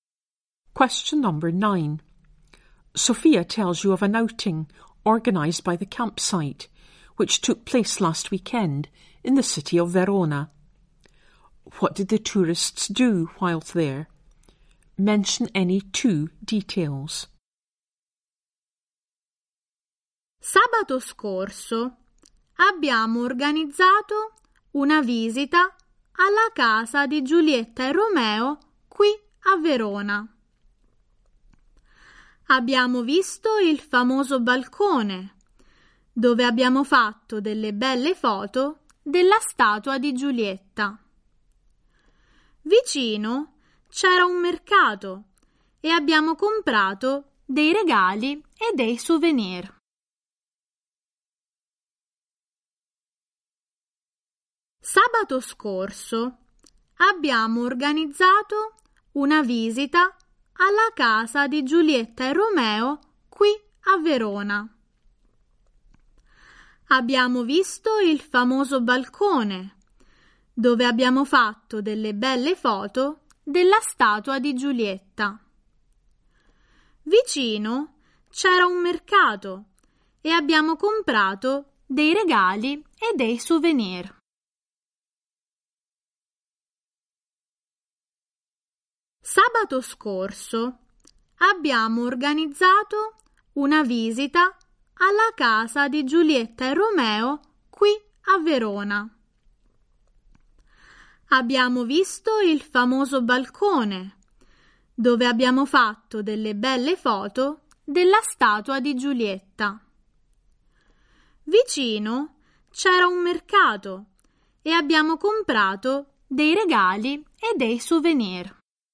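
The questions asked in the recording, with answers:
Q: What did the tourists do whilst there?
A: Visited Juliet and Romeo's house, saw the balcony, took photos of Juliet's statue, bought gifts and souvenirs at a market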